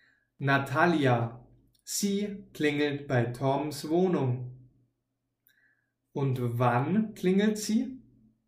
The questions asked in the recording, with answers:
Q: Und wann klingelt sie?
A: Sie klingelt nachts um 12.